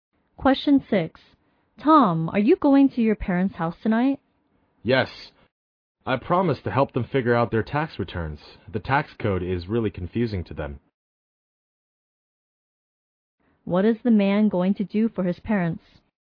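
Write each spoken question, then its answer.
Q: What is the man going to do for his parents?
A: Help them with their tax returns.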